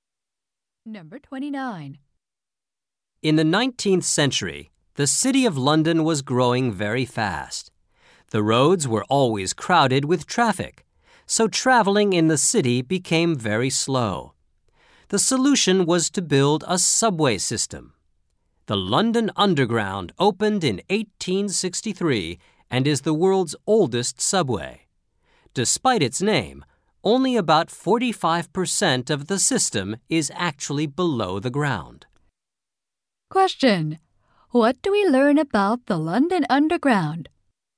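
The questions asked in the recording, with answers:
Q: What do we learn about the London Underground?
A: It is the world's oldest subway, and only about 45% of it is underground.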